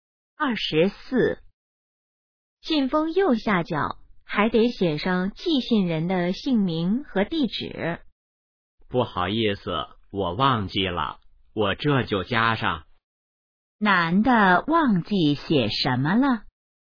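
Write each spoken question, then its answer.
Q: 男的忘记写什么了?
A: 寄信人的姓名和地址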